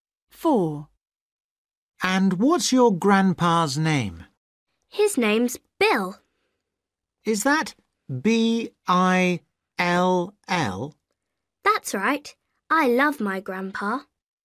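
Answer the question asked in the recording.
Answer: Bill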